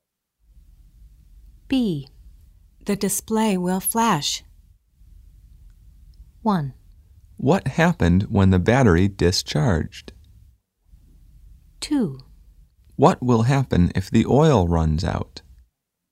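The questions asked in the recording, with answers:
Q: The display will flash.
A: 2: What will happen if the oil runs out?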